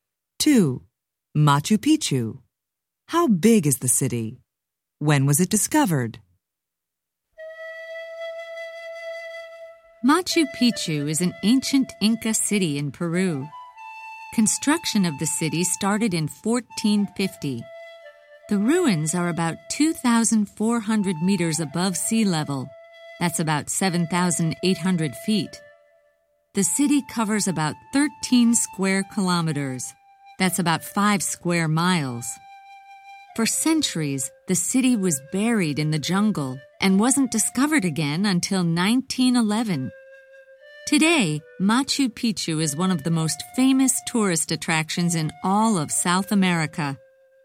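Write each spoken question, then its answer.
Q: Machu Picchu. How big is the city?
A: About 13 square kilometers (5 square miles)

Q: When was it discovered?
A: 1911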